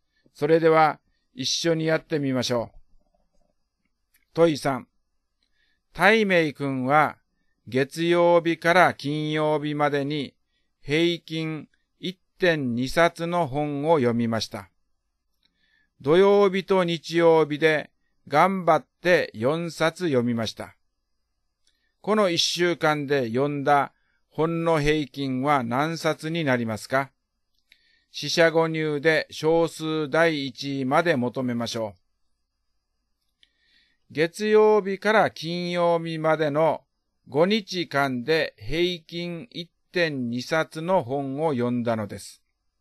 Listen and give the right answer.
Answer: 答えは1.4 冊になります。